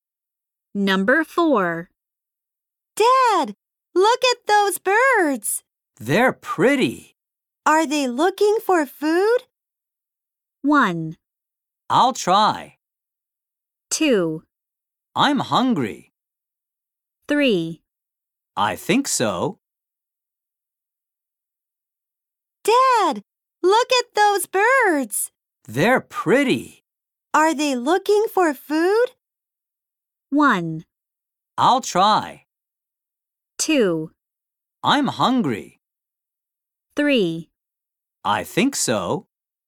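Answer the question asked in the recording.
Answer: 3: I think so.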